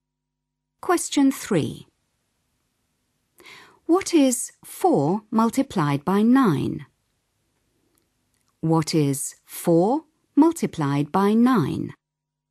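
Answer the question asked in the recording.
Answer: 36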